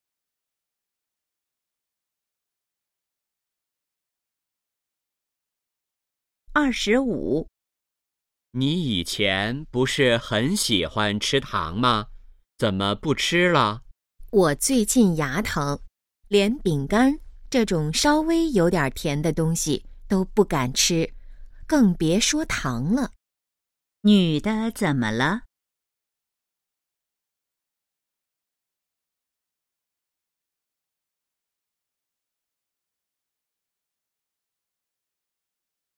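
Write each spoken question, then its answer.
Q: 女的怎么了?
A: 牙疼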